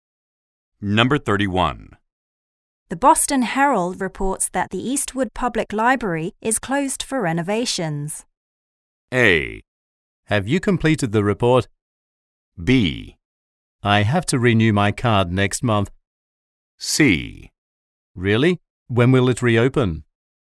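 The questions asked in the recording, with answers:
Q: The Boston Herald reports that the Eastwood Public Library is closed for renovations.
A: C: Really? When will it reopen?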